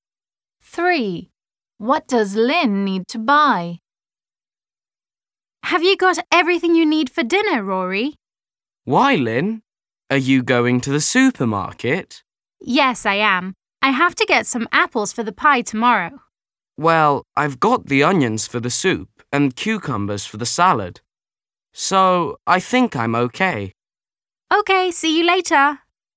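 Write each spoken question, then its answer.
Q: What does Lynn need to buy?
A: apples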